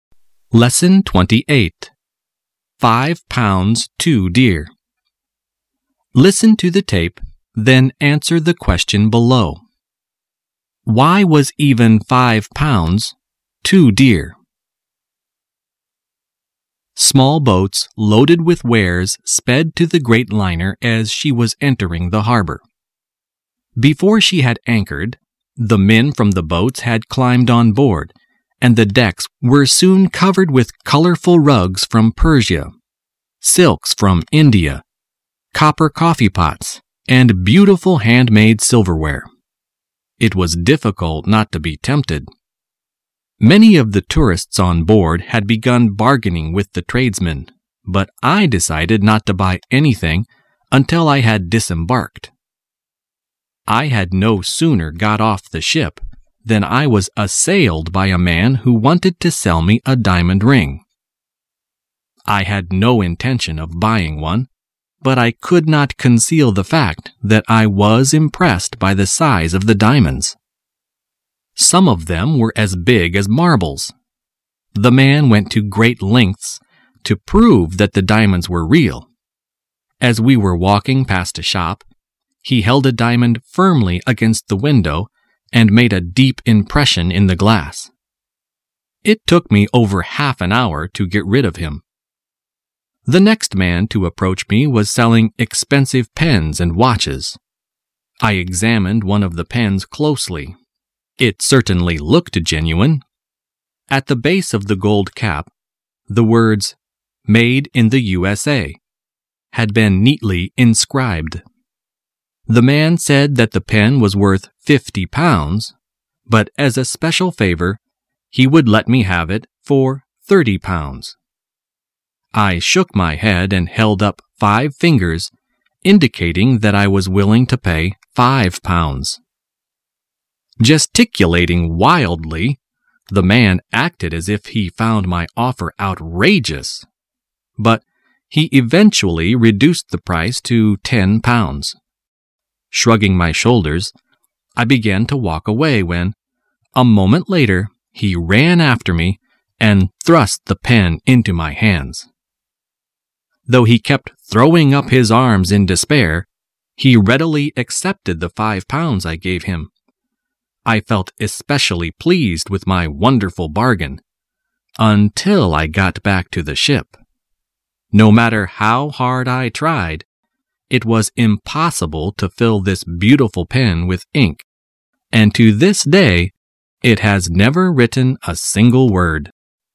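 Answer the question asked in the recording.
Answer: Because the pen was useless: it could never be filled with ink and never wrote a word.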